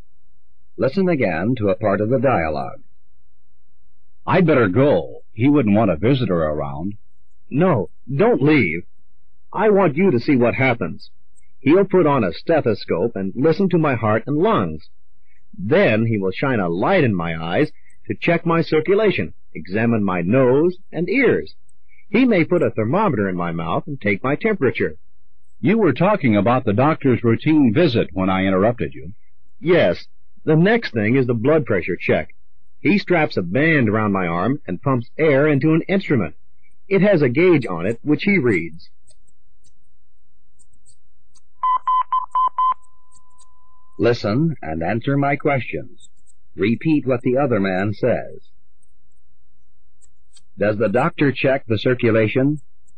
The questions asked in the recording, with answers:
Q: Does the doctor check the circulation?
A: Yes, he does.